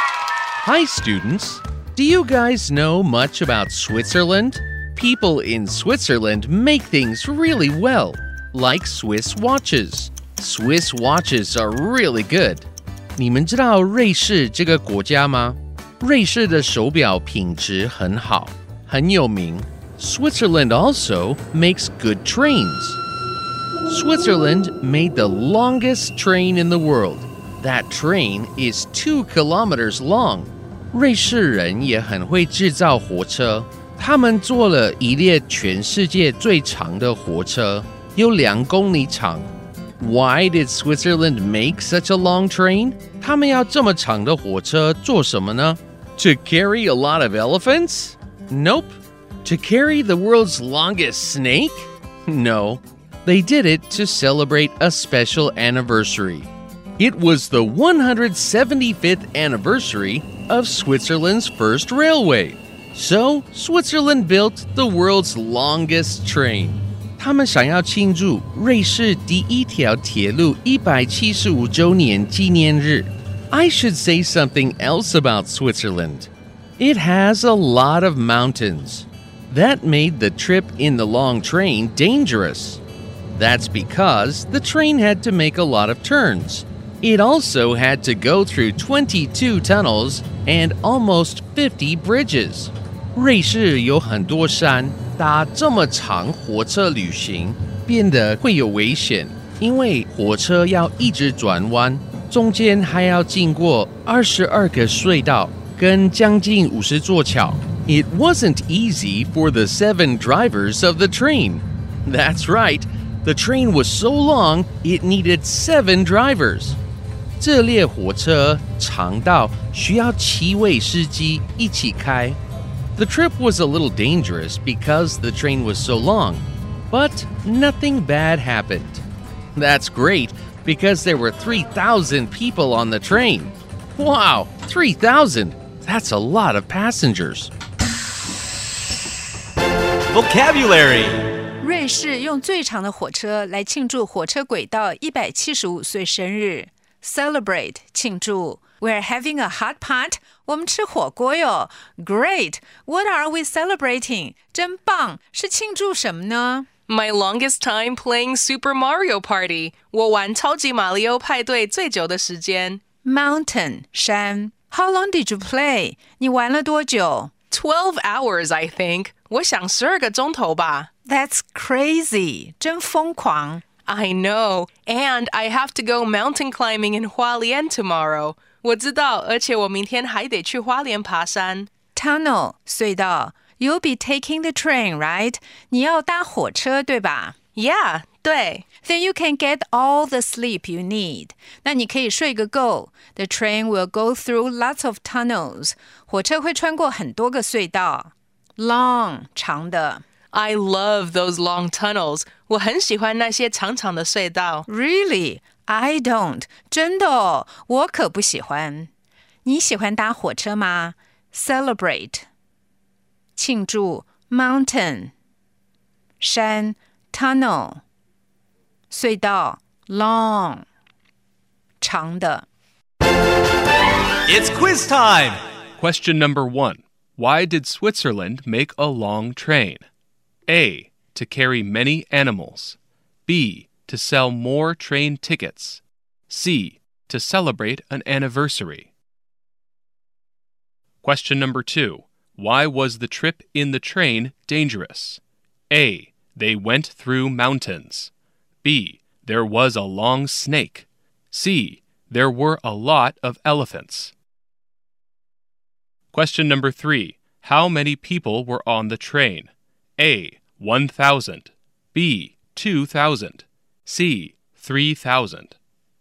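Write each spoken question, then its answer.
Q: Why did Switzerland make a long train?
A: C: To celebrate an anniversary.

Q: Why was the trip in the train dangerous?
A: A: They went through mountains.

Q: How many people were on the train?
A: C: 3,000.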